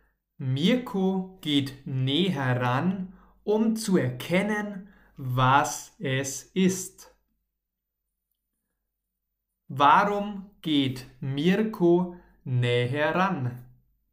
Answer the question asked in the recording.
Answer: Um zu erkennen, was es ist.